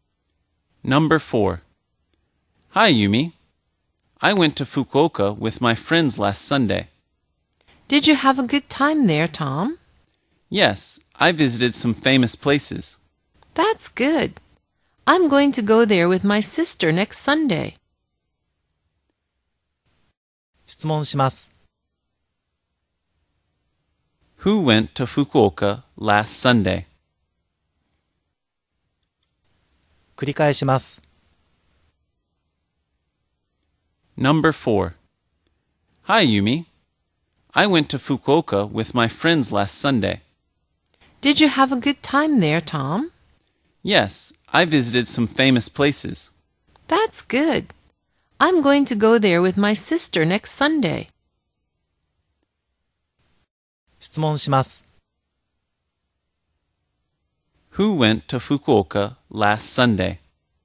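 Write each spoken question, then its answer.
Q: Who went to Fukuoka last Sunday?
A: Tom and his friends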